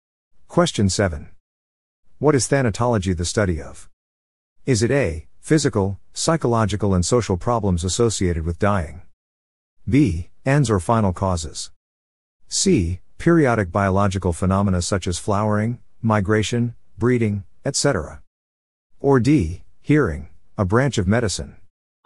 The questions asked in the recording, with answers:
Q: What is thanatology the study of?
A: The answer is A. Physical, psychological, and social problems associated with dying.